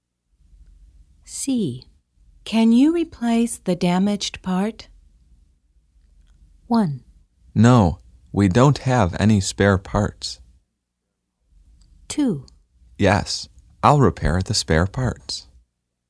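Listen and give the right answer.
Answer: 1: No, we don't have any spare parts.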